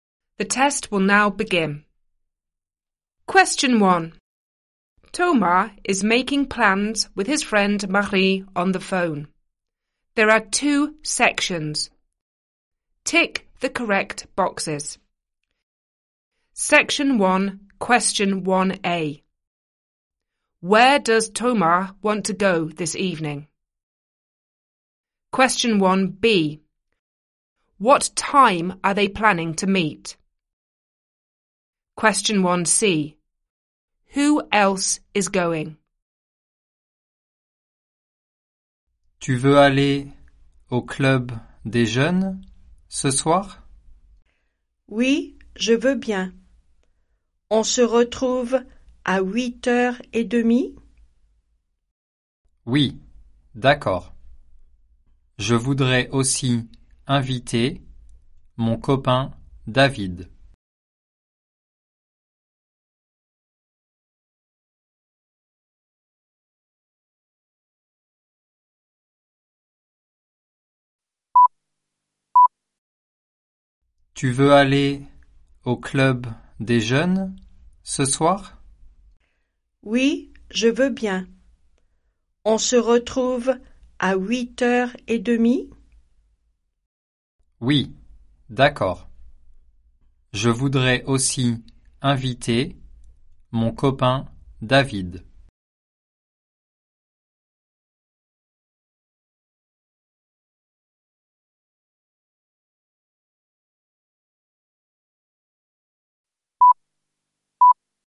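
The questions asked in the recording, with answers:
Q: Where does Thomas want to go this evening?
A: To the youth club

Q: What time are they planning to meet?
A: 8:30

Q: Who else is going?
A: His friend David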